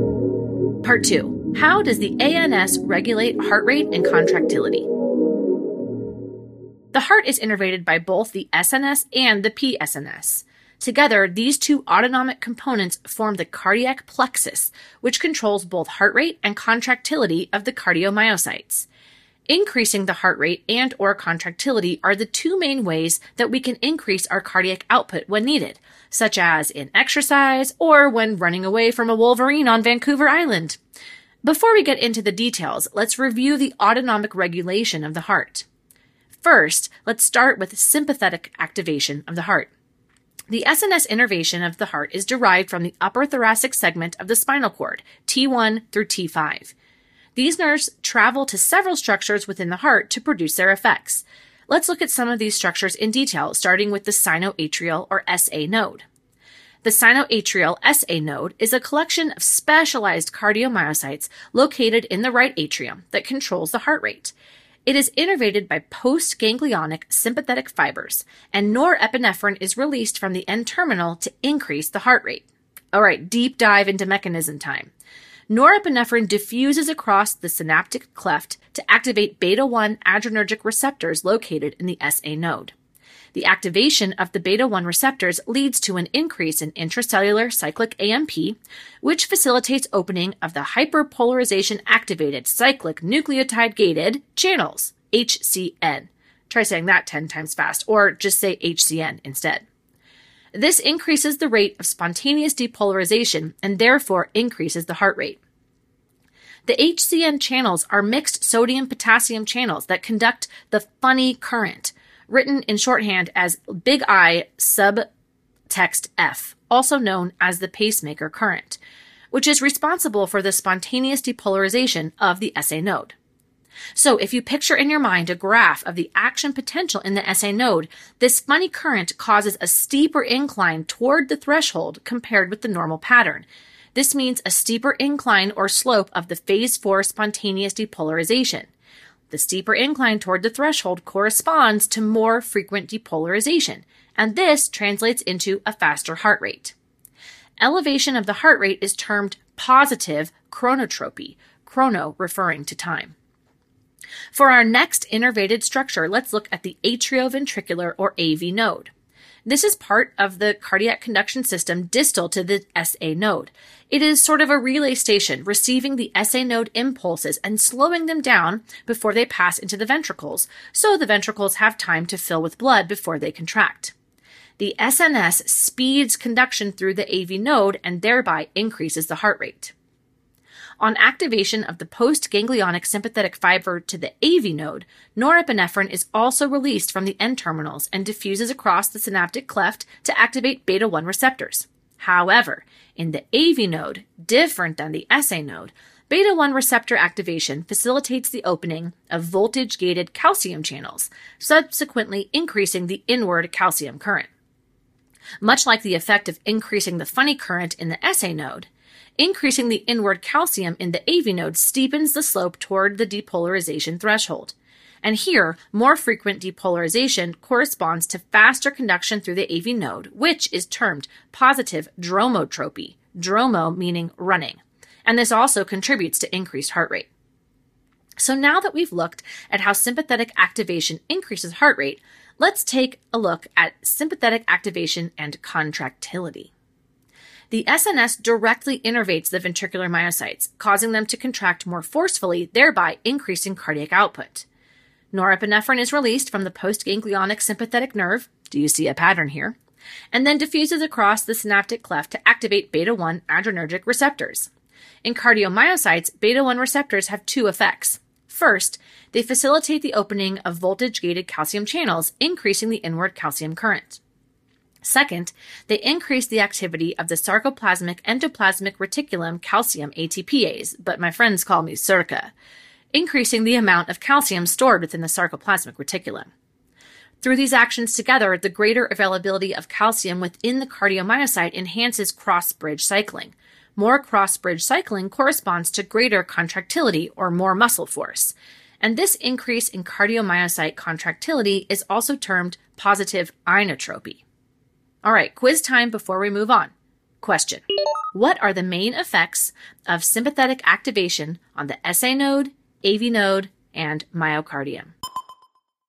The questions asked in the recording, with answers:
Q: what are the main effects of sympathetic activation on the SA node, AV node, and myocardium?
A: SNS activation leads to positive chronotropy at the SA node, dromotropy at the AV node, and inotropy in the myocardium.